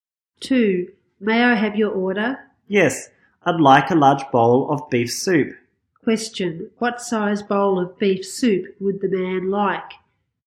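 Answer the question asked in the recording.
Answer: A large bowl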